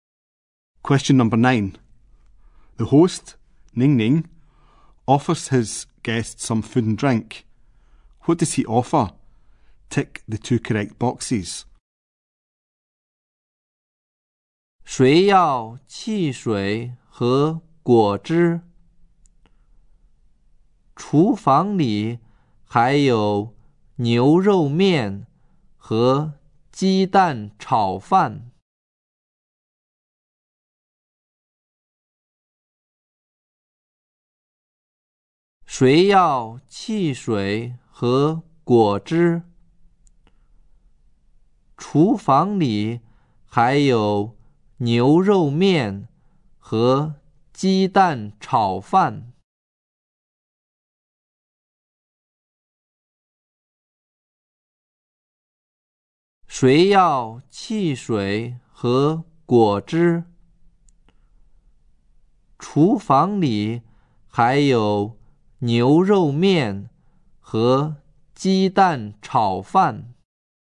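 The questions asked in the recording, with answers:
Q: What does he offer?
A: Soft drinks and fruit juice; beef noodles and egg fried rice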